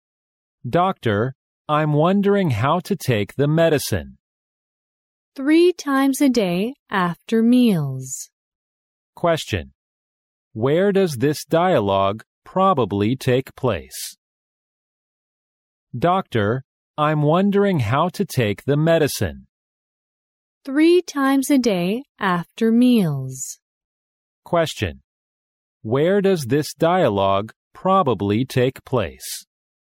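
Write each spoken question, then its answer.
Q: Where does this dialogue probably take place?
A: In a hospital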